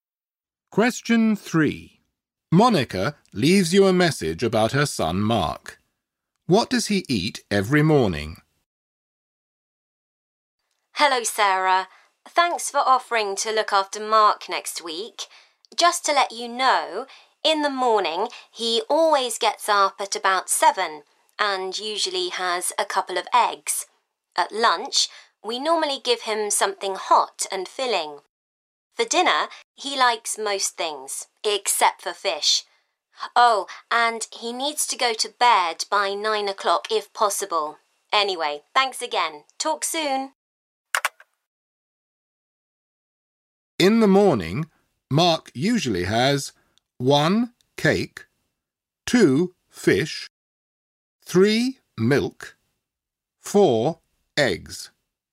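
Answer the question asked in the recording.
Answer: 4: Eggs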